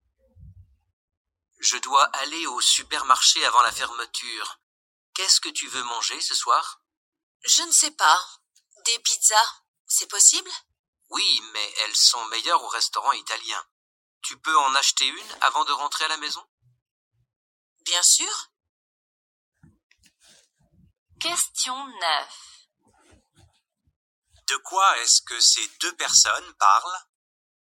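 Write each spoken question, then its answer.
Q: De quoi est-ce que ces deux personnes parlent?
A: Du repas du soir (acheter une pizza)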